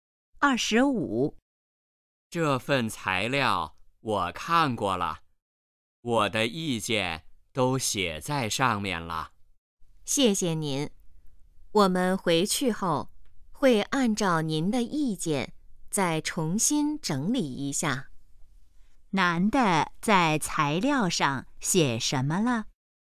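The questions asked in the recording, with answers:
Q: 男的在材料上写什么了?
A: 意见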